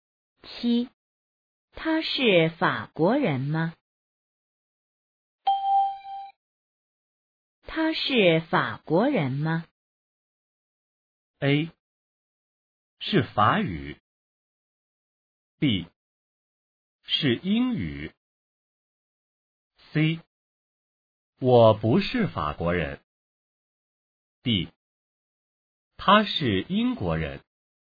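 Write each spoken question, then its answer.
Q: 他是法国人吗?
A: D: 他是英国人。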